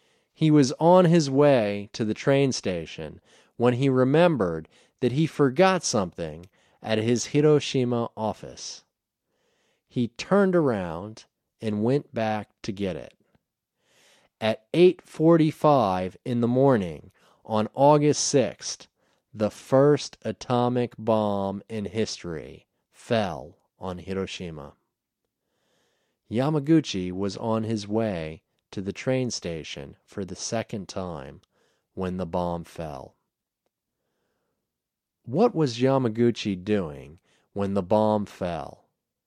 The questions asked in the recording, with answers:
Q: What was Yamaguchi doing when the bomb fell?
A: Yamaguchi was on his way to the train station when the bomb fell.